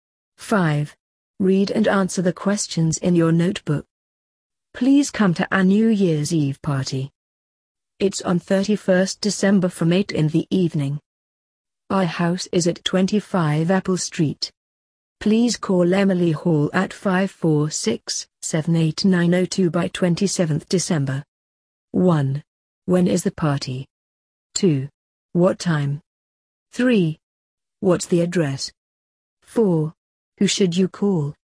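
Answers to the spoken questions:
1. On 31st December
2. From 8 in the evening
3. 25 Apple Street
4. Emily Hall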